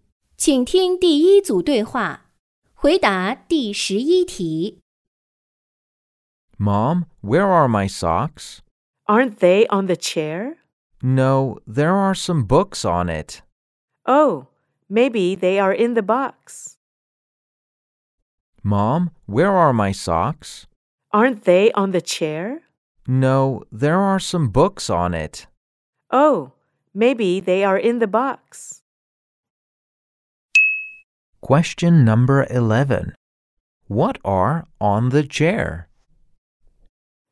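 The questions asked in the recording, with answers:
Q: What are on the chair?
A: Some books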